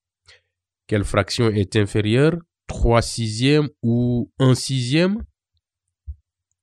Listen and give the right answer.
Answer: 1 sixième est inférieur à 3 sixièmes car elles ont le même dénominateur et 1 est inférieur à 3.